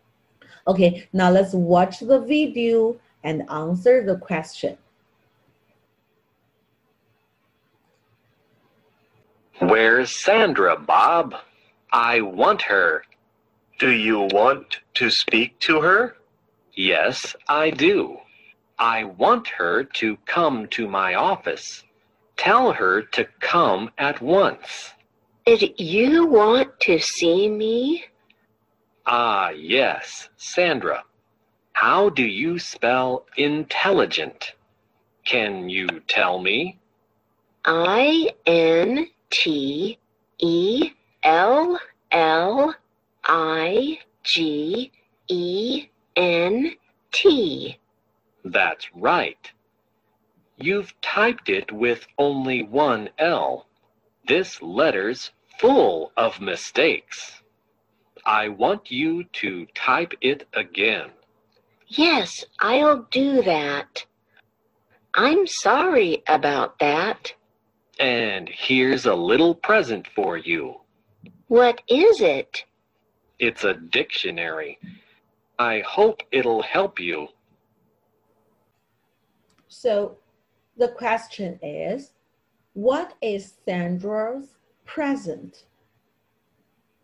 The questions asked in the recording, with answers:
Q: So, the question is, what is Sandra's present?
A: A dictionary. Yes, great.